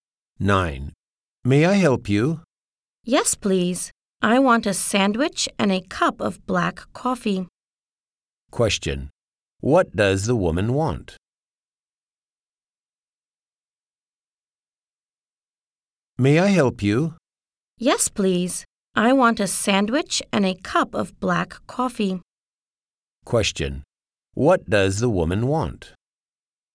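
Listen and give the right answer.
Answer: A sandwich and a cup of black coffee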